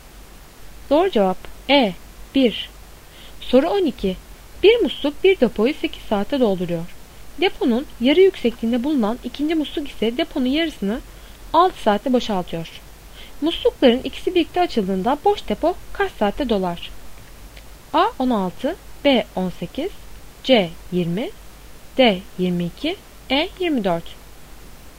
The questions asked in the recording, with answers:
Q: Muslukların ikisi birlikte açıldığında boş depo kaç saatte dolar?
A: Doğru cevap A 16.